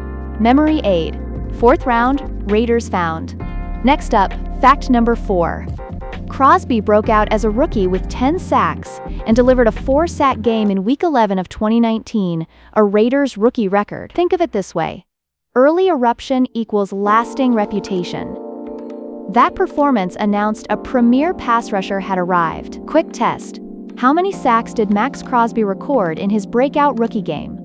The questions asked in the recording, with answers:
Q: How many sacks did Max Crosby record in his breakout rookie game?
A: Correct answer, 4.